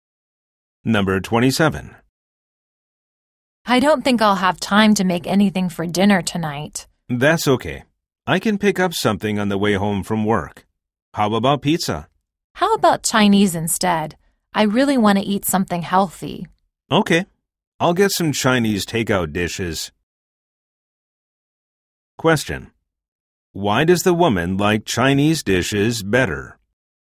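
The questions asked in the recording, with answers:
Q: Why does the woman like Chinese dishes better?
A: She wants to eat something healthy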